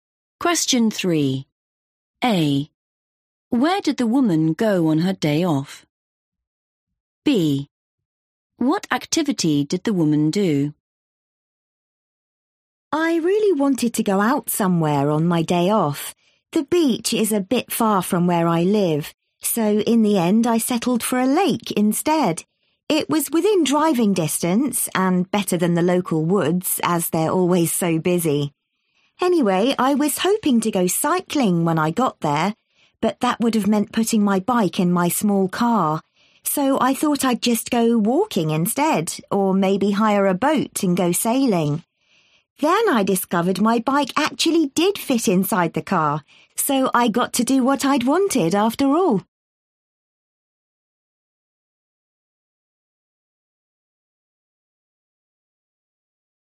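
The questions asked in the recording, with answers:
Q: Where did the woman go on her day off?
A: a lake

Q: What activity did the woman do?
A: cycling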